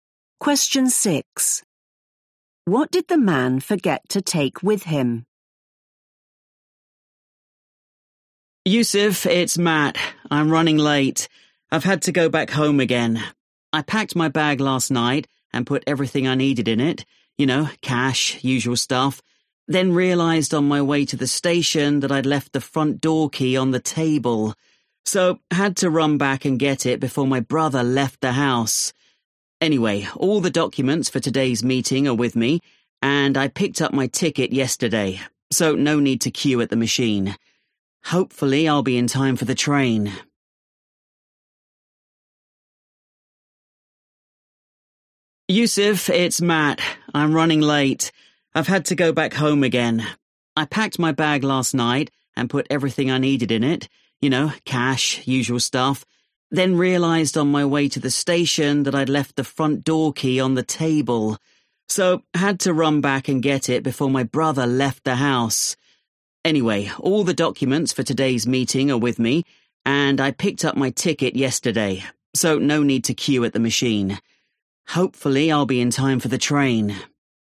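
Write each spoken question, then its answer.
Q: What did the man forget to take with him?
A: the front door key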